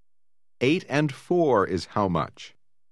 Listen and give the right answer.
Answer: 12.